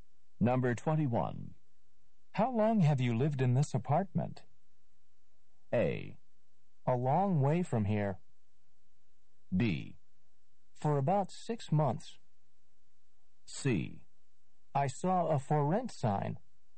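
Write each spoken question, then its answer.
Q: How long have you lived in this apartment?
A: B: For about 6 months.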